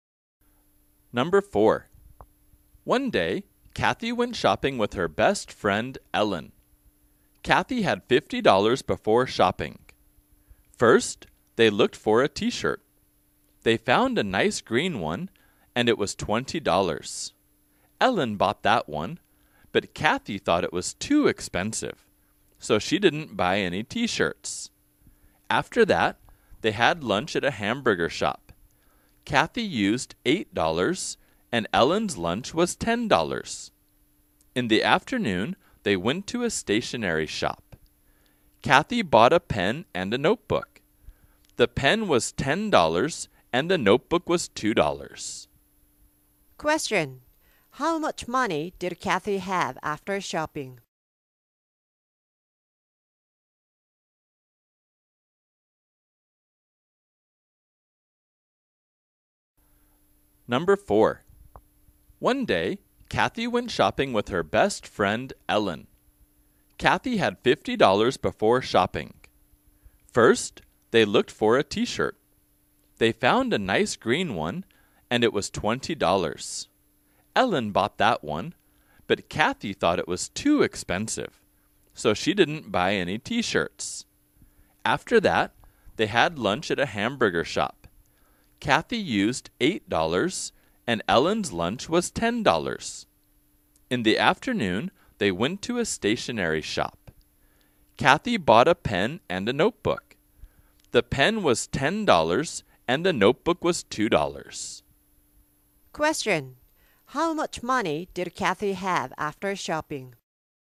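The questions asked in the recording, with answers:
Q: how much money did Kathy have after shopping?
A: $30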